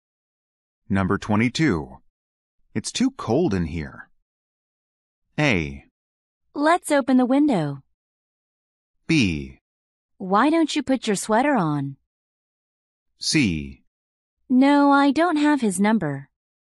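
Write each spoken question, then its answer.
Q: It's too cold in here.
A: B: Why don't you put your sweater on?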